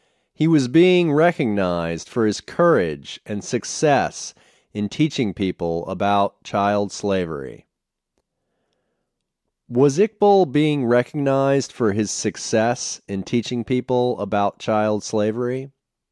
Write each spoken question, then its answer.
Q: Was Iqbal being recognized for his success in teaching people about child slavery?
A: Yes, Iqbal was being recognized for his success in teaching people about child slavery.